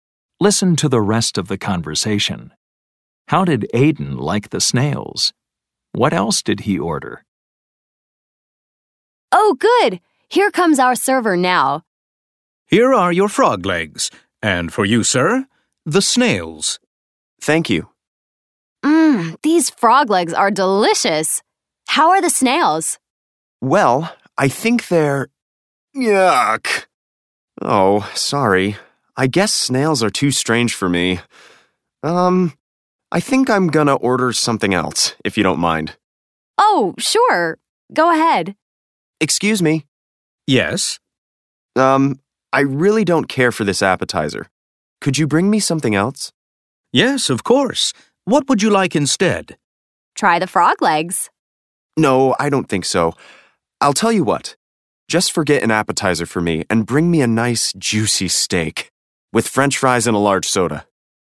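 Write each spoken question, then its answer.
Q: How did Aiden like the snails?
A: He didn't like them; they were too strange for him.

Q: What else did he order?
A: A steak with French fries and a large soda.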